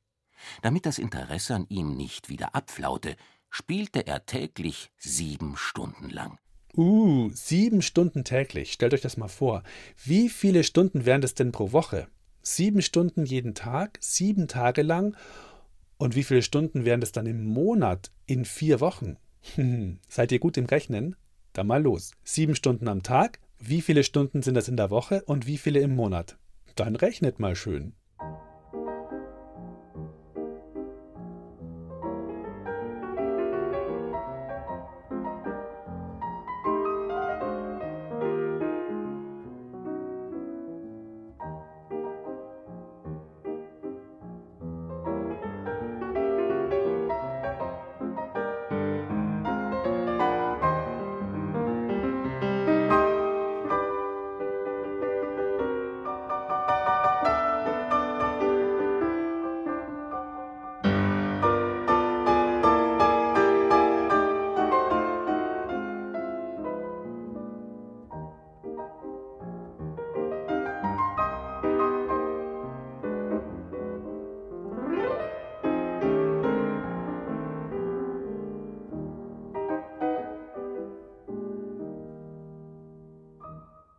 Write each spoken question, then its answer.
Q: Sieben Stunden am Tag. Wie viele Stunden sind das in der Woche und wie viele im Monat?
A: Sieben Stunden mal sieben Tage mal vier Wochen ist gleich 196 Stunden.